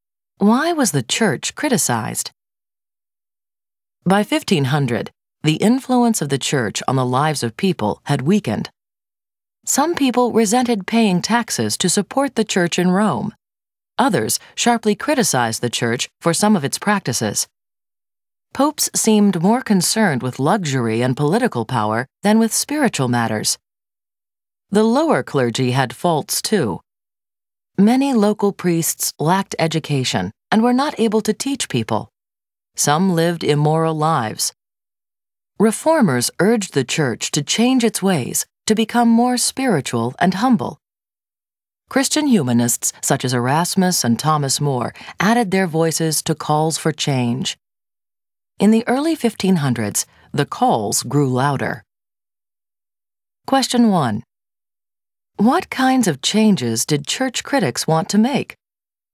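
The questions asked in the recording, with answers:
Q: What kinds of changes did church critics want to make?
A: They wanted the church to become more spiritual and humble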